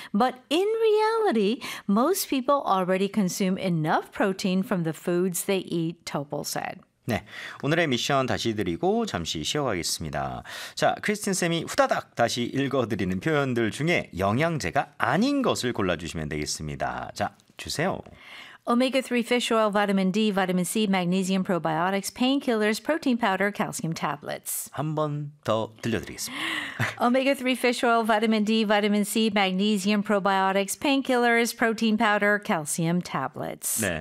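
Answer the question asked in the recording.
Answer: painkillers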